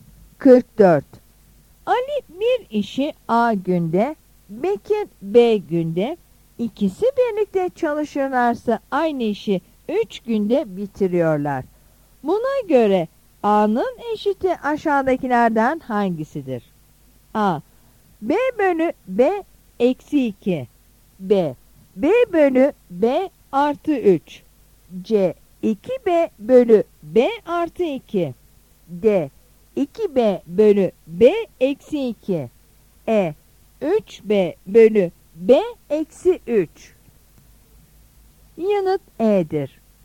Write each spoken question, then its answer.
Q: Buna göre A'nın eşiti aşağıdakilerden hangisidir?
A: Yanıt E'dir.